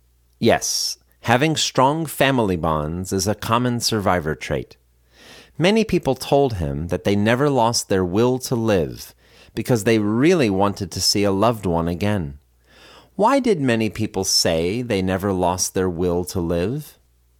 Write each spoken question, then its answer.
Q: Why did many people say they never lost their will to live?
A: Many people said they never lost their will to live because they wanted to see a loved one again.